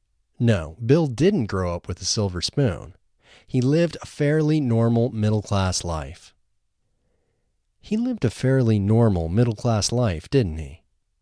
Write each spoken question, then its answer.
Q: He lived a fairly normal middle-class life, didn't he?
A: Yes, he lived a fairly normal middle-class life.